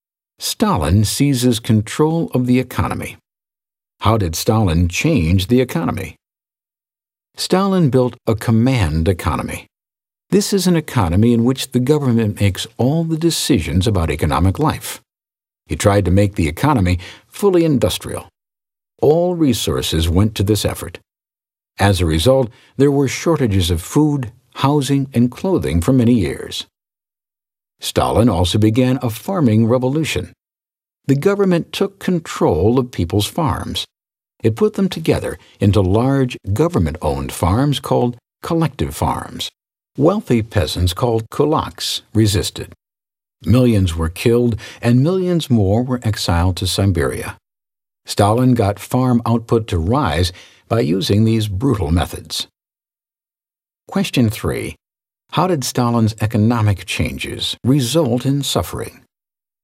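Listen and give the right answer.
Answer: Shortages of food, housing and clothing for many years; millions of kulaks killed or exiled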